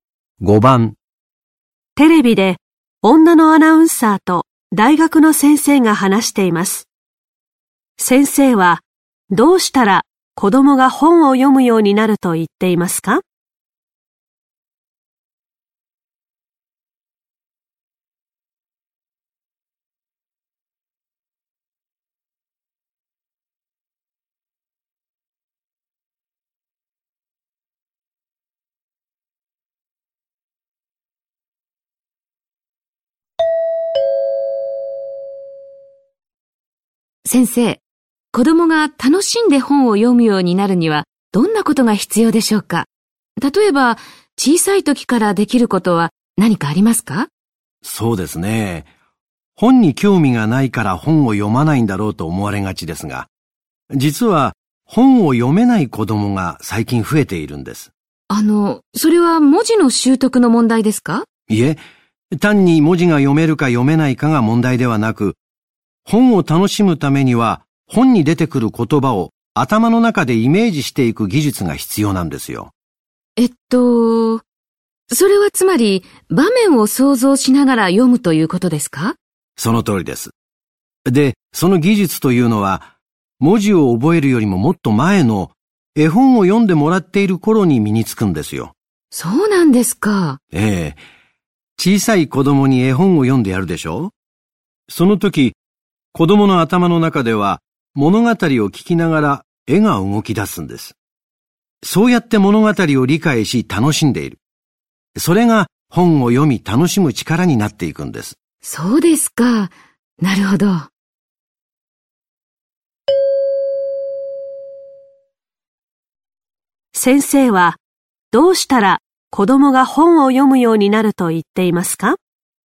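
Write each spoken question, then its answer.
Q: 先生はどうしたら子供が本を読むようになると言っていますか?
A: 小さい時に絵本を読んでやる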